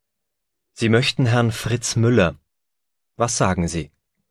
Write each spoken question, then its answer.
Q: Was sagen Sie?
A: Der Teilnehmer heißt Fritz Müller.